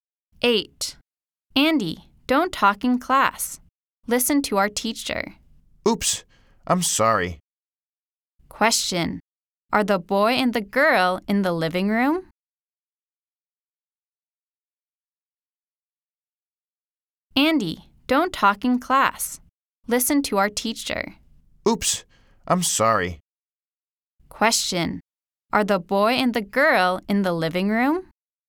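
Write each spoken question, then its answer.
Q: Are the boy and the girl in the living room?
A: No, they are in the classroom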